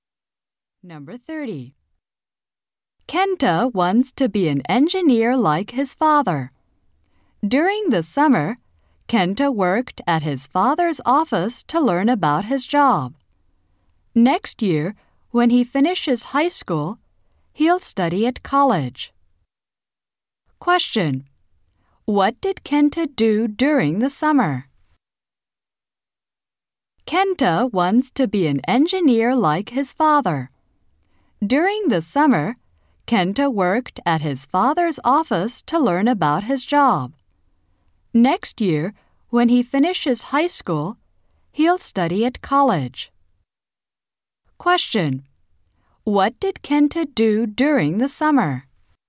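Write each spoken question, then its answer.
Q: What did Kenta do during the summer?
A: He worked at his father's office.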